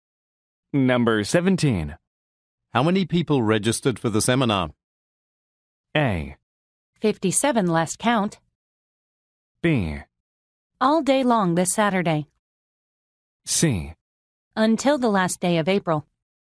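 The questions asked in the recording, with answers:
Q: How many people registered for the seminar?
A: A: 57 last count.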